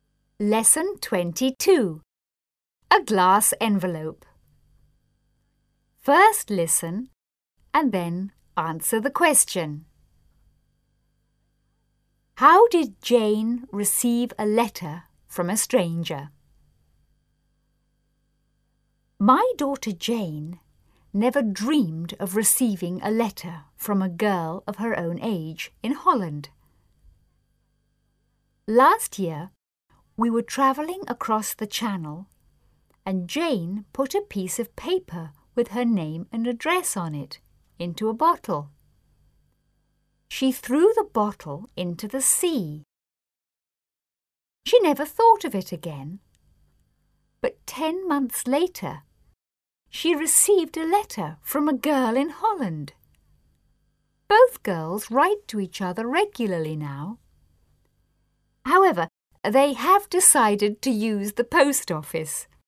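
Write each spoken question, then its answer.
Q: How did Jane receive a letter from a stranger?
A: She put her name and address in a bottle and threw it into the sea; a girl in Holland found it and wrote to her.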